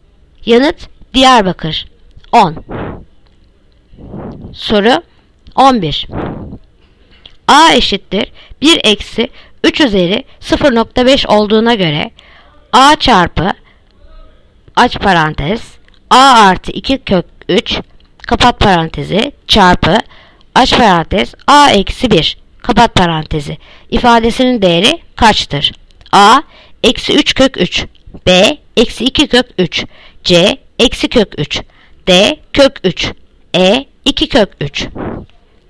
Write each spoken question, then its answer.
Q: A eşittir 1 eksi 3 üzeri 0.5 olduğuna göre A çarpı aç parantez A artı 2 kök 3 kapat parantezi çarpı aç parantez A eksi 1 kapat parantezi ifadesinin değeri kaçtır?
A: Yanıt Edirne 2 kök 3.